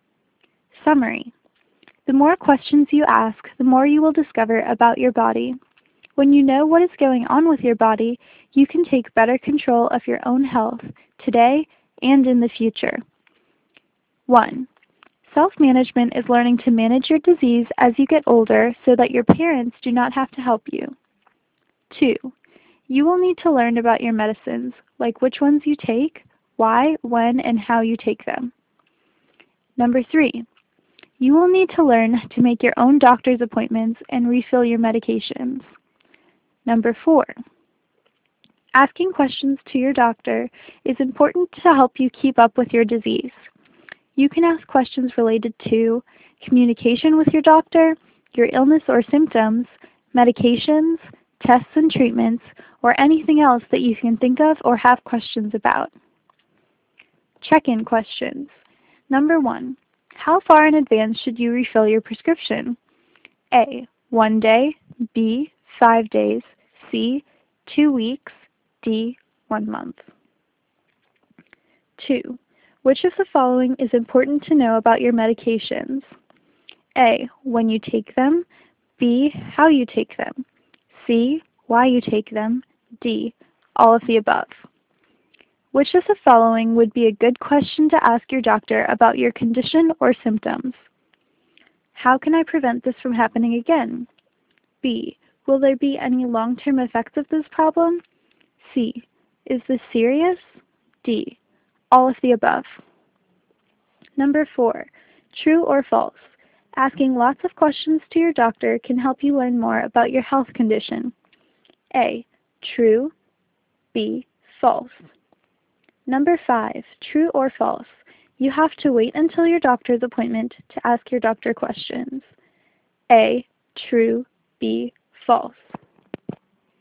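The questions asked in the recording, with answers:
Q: Which of the following is important to know about your medications?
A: D: all of the above

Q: Which of the following would be a good question to ask your doctor about your condition or symptoms?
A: D: all of the above

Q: true or false. Asking lots of questions to your doctor can help you learn more about your health condition.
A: A: true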